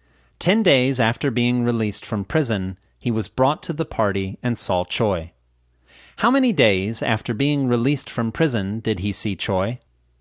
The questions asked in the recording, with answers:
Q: How many days after being released from prison did he see Choi?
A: He saw Choi just 10 days after being released from prison.